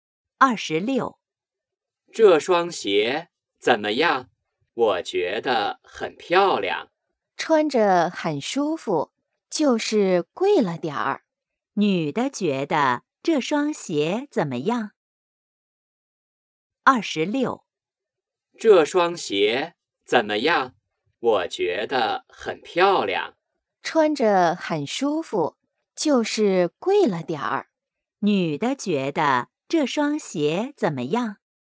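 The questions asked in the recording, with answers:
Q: 女的觉得这双鞋怎么样?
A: 很舒服,但有点贵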